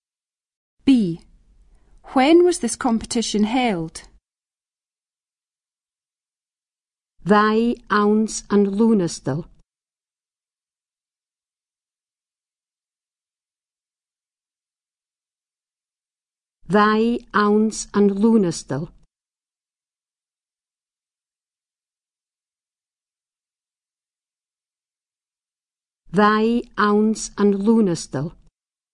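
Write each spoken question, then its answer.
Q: When was this competition held?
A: In August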